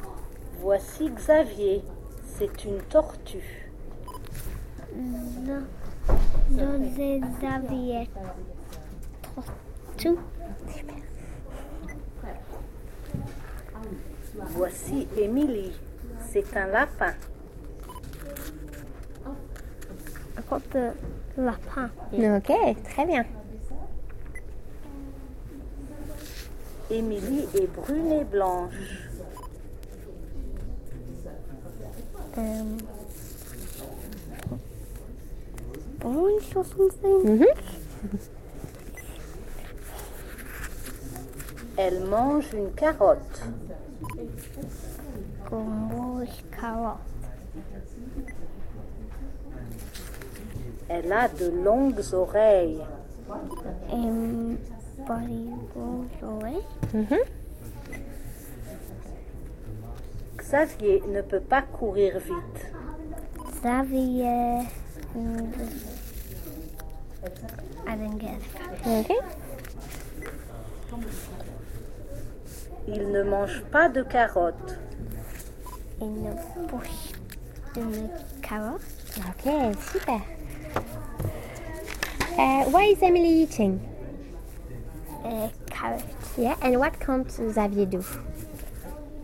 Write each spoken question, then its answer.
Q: Why is Emily eating?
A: Carrot.